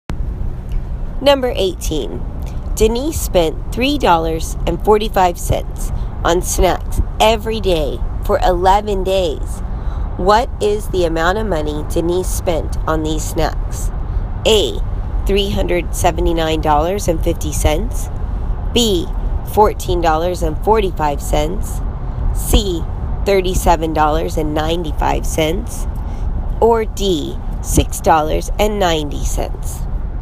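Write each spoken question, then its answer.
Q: What is the amount of money Denise spent on these snacks?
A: C: $37.95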